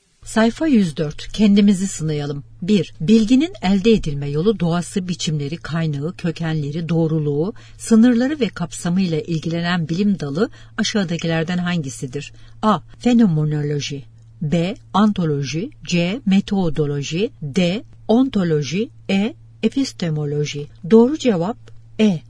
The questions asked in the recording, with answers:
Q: Bilginin elde edilme yolu, doğası, biçimleri, kaynağı, kökenleri, doğruluğu, sınırları ve kapsamıyla ilgilenen bilim dalı aşağıdakilerden hangisidir?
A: Doğru cevap E.